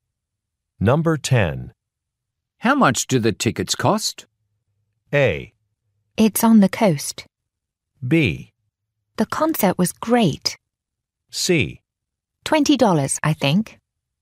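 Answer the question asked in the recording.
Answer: C: $20, I think.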